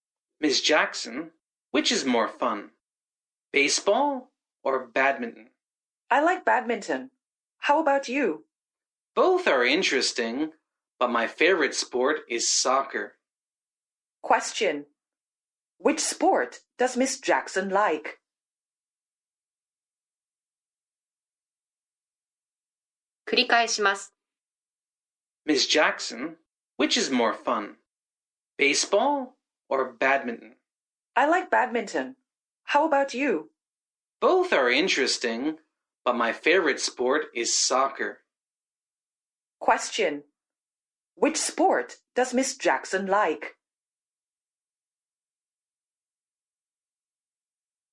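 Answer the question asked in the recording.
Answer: Badminton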